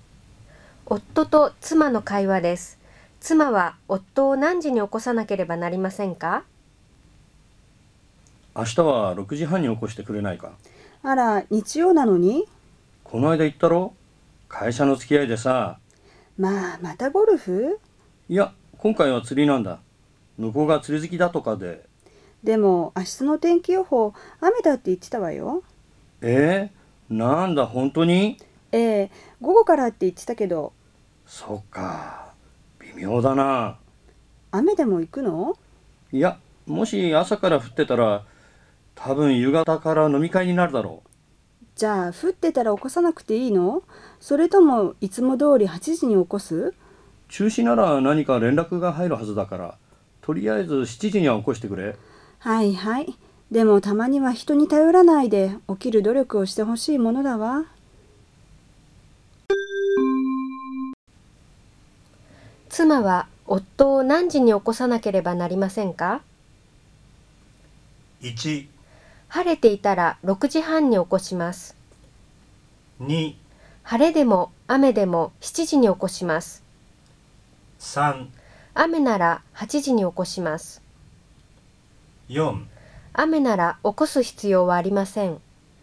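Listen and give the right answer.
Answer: 1: 晴れていたら6時半に起こします。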